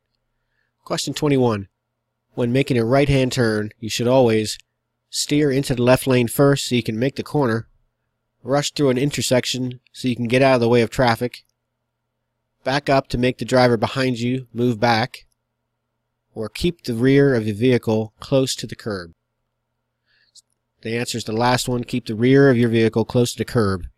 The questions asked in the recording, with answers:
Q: When making a right-hand turn, you should always steer into the left lane first so you can make the corner, rush through an intersection so you can get out of the way of traffic, back up to make the driver behind you move back, or keep the rear of your vehicle close to the curb.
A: The answer is the last one, keep the rear of your vehicle close to the curb.